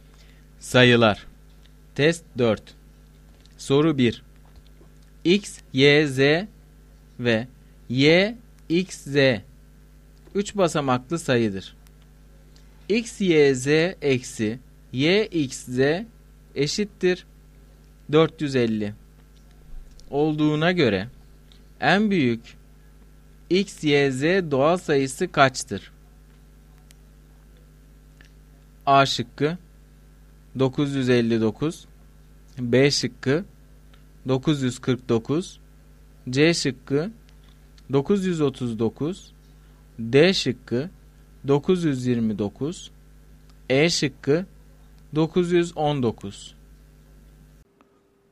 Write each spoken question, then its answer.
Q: X, Y, Z eksi Y, X, Z eşittir 450 olduğuna göre en büyük X, Y, Z doğal sayısı kaçtır?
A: Doğru cevap B şıkkı.